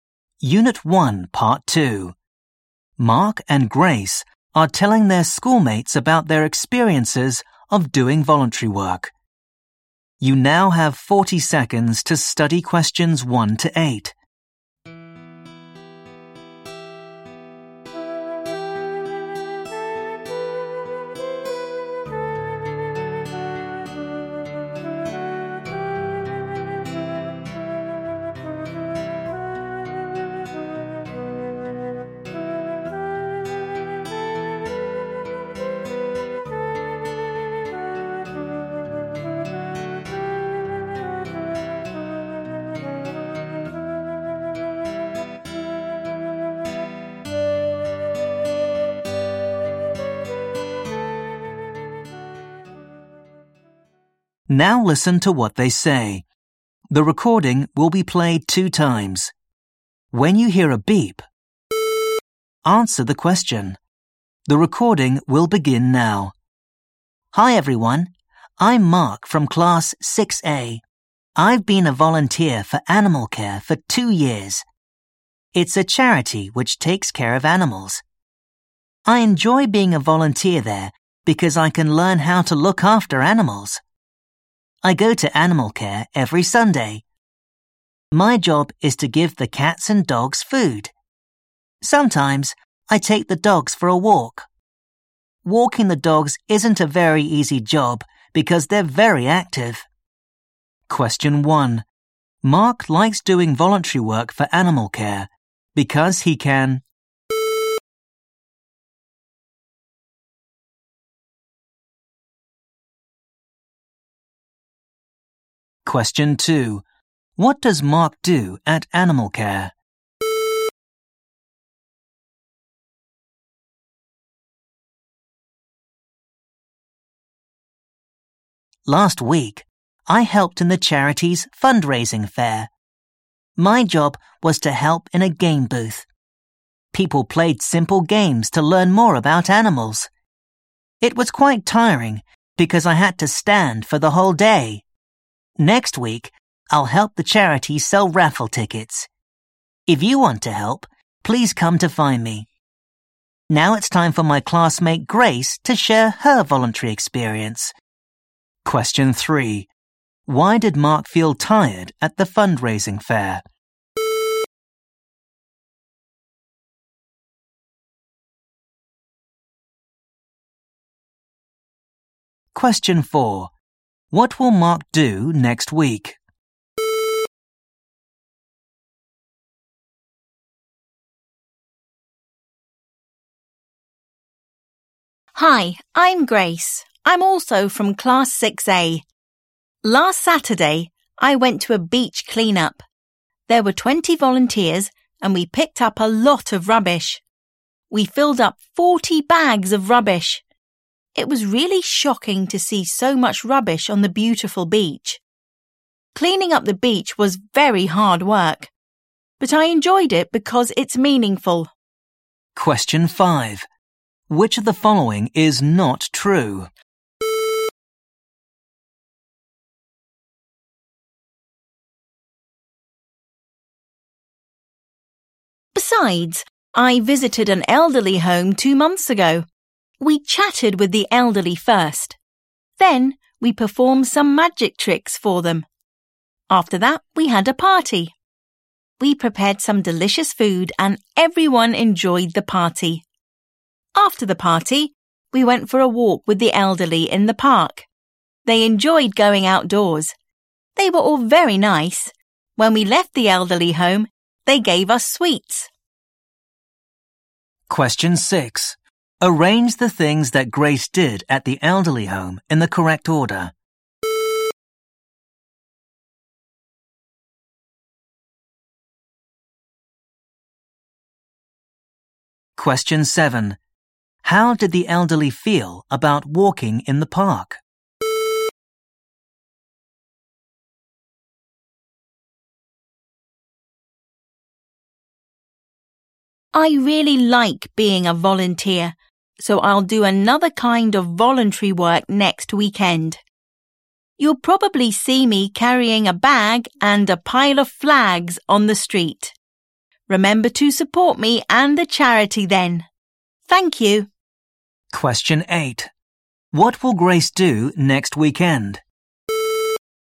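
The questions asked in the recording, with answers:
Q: What does Mark do at Animal Care?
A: He feeds the cats and dogs and sometimes walks the dogs.

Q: Why did Mark feel tired at the fundraising fair?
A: He had to stand for the whole day.

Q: What will Mark do next week?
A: Help the charity sell raffle tickets.

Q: How did the elderly feel about walking in the park?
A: They enjoyed it.

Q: What will Grace do next weekend?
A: Sell flags on the street for a charity (a flag day).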